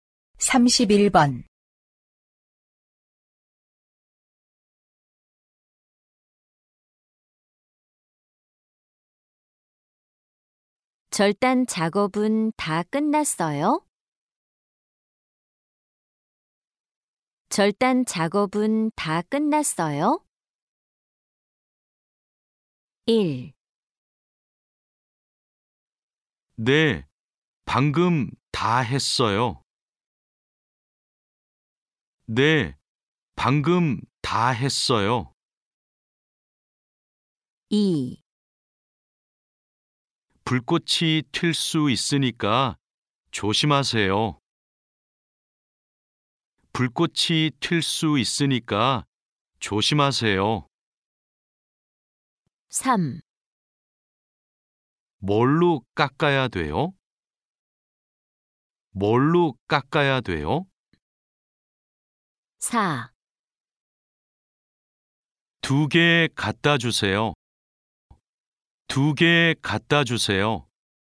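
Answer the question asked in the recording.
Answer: 1: 네, 방금 다 했어요.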